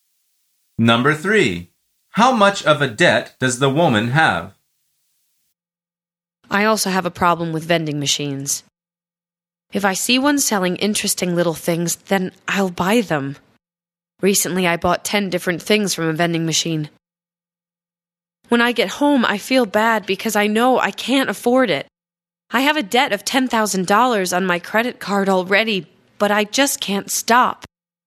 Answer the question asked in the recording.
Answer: The answer is $10,000.